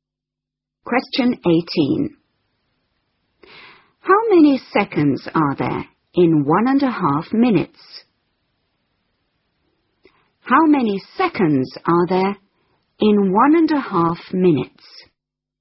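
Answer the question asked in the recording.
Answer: 90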